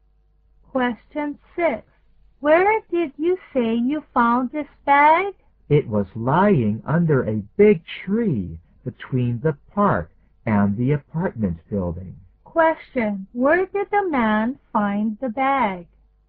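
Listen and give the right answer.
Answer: Under a big tree between the park and the apartment building.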